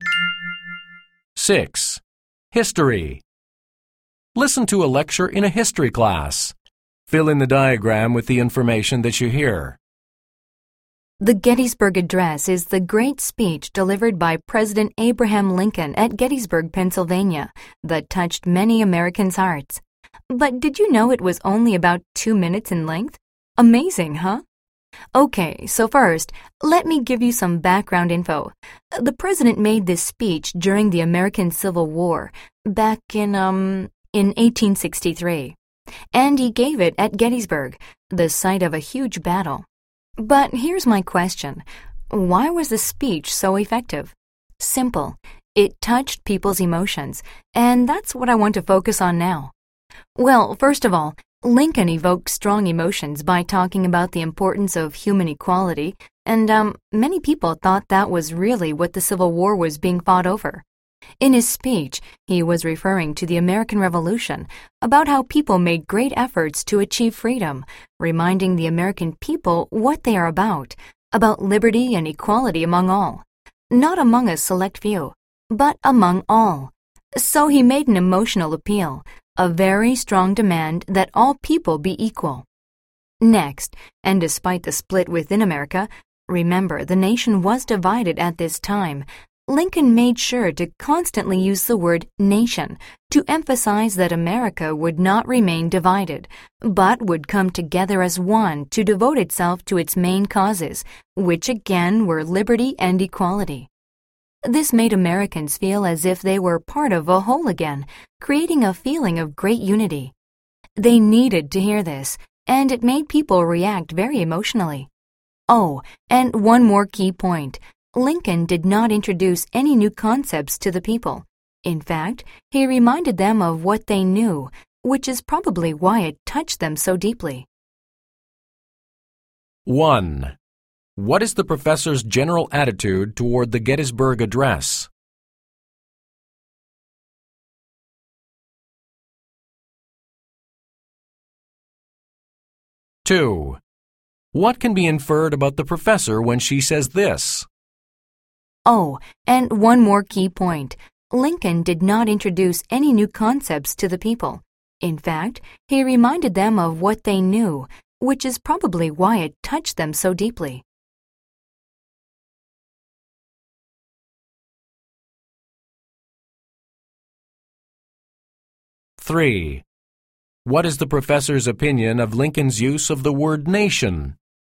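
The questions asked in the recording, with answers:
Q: What is the professor's general attitude toward the Gettysburg Address?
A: She admires it and thinks it was very effective because it touched people's emotions

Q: What is the professor's opinion of Lincoln's use of the word nation?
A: She thinks it was effective: it made Americans feel part of a whole again and created a feeling of unity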